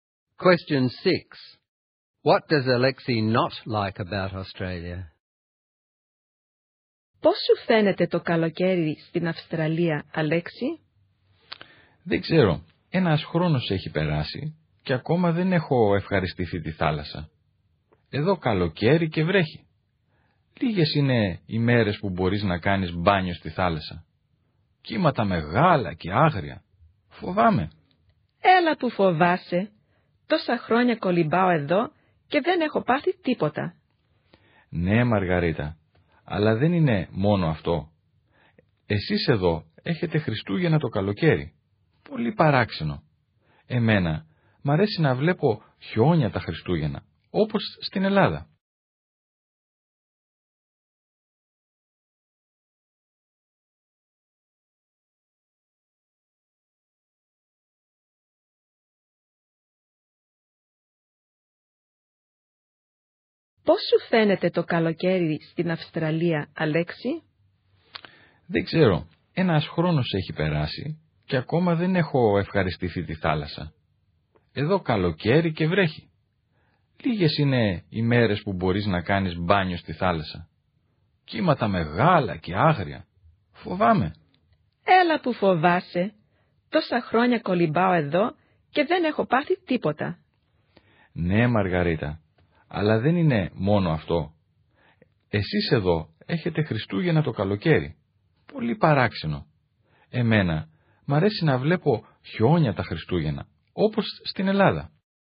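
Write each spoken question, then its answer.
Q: What does Alexei not like about Australia?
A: It rains in summer, there are few days for swimming, the waves are big and wild, and Christmas is in summer without snow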